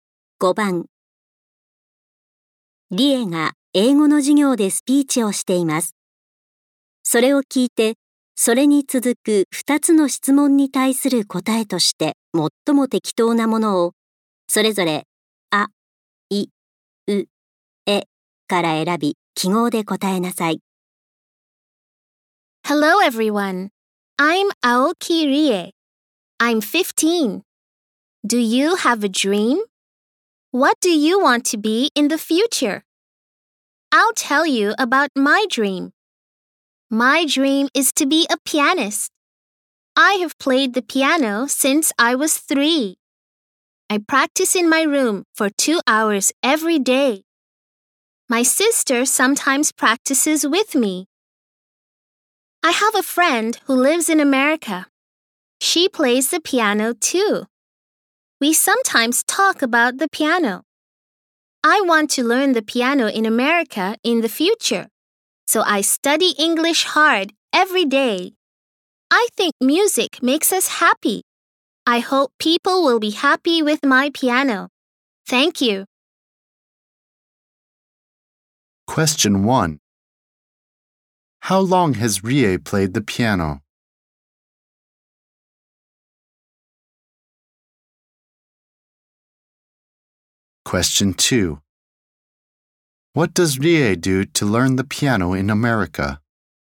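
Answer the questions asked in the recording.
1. Since she was 3
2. She studies English hard every day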